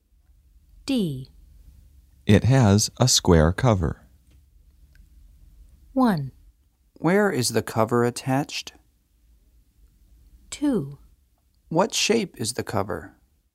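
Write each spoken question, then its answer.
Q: It has a square cover.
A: 2: What shape is the cover?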